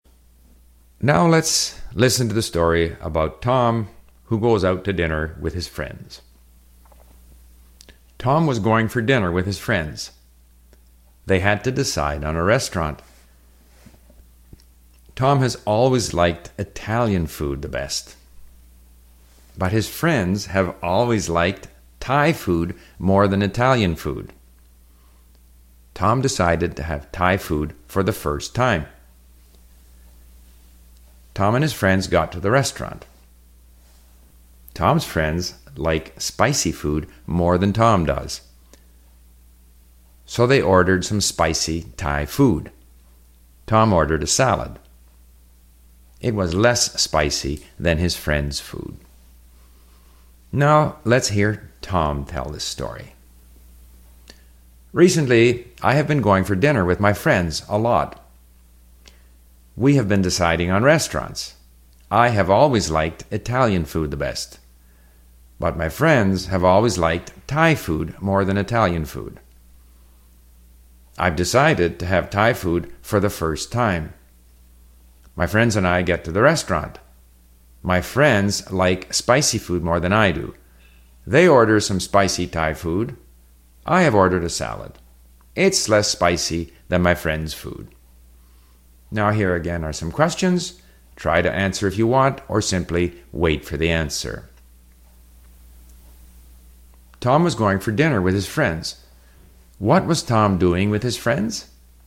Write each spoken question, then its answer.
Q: What was Tom doing with his friends?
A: He was going for dinner with his friends.